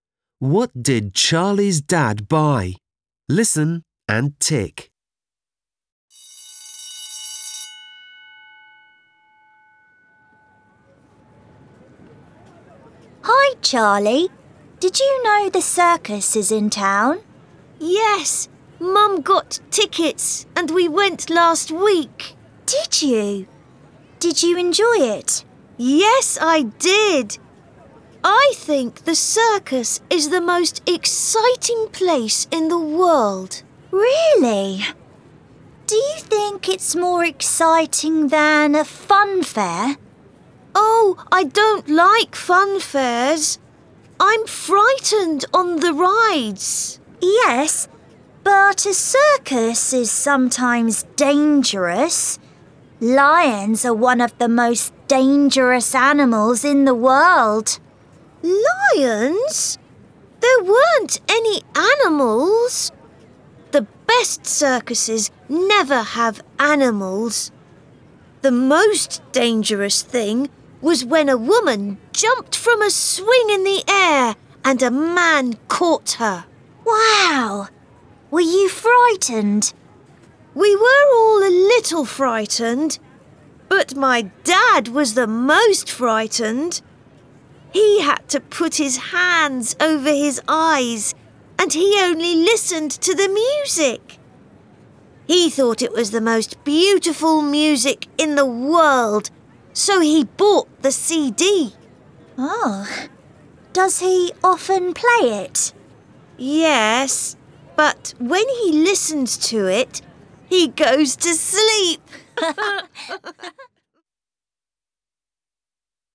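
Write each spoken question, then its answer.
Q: What did Charlie's dad buy?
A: the CD of the circus music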